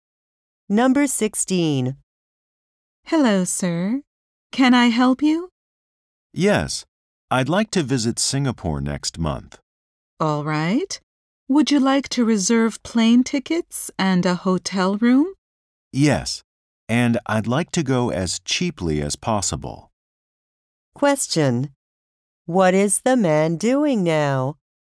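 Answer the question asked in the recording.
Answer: Planning a trip to Singapore, reserving plane tickets and a hotel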